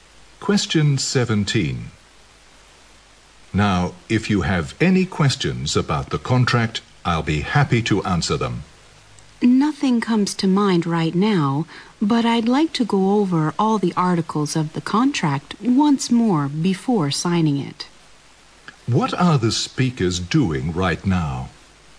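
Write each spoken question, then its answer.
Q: What are the speakers doing right now?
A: Talking about a contract before signing it.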